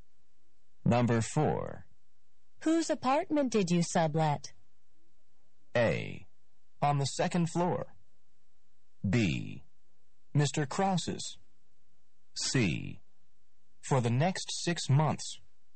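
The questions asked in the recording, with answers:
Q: Whose apartment did you sublet?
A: B: Mr. Krause's.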